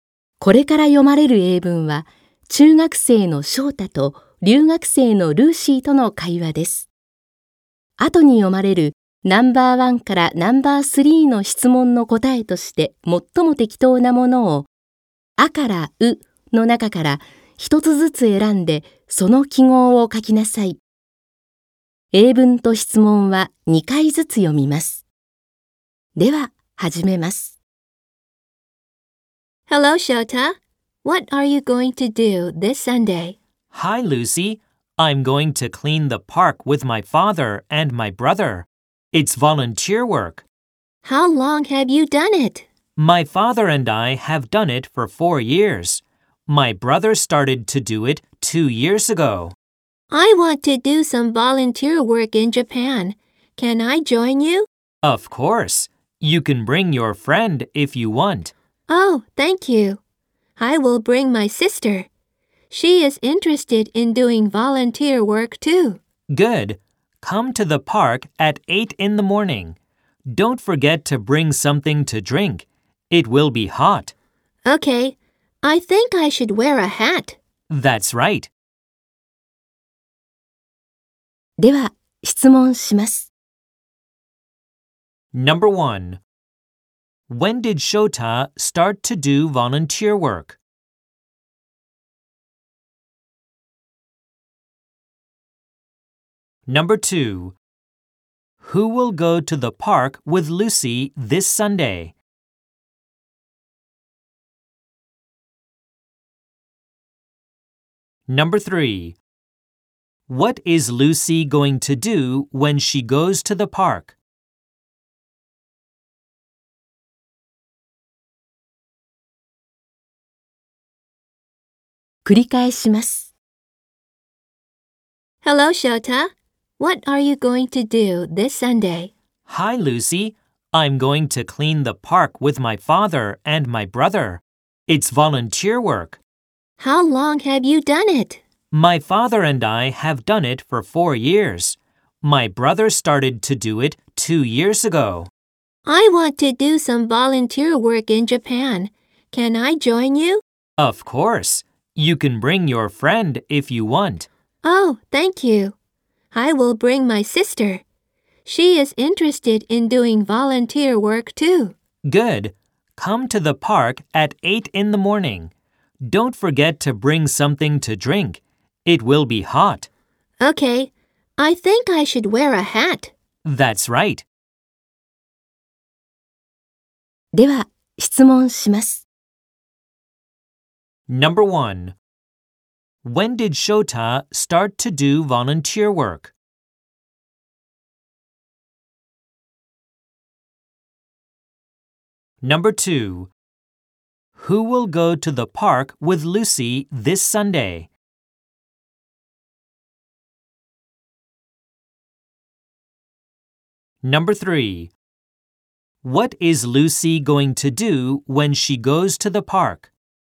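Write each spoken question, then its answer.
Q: When did Shota start to do volunteer work?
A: Four years ago

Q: Who will go to the park with Lucy this Sunday?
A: Her sister

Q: What is Lucy going to do when she goes to the park?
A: Clean the park (volunteer work)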